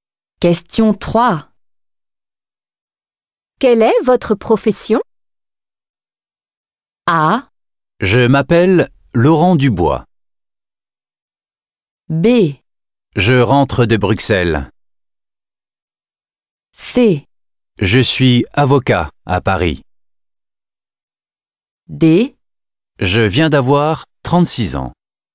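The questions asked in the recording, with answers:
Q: Quelle est votre profession?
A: C: Je suis avocat à Paris.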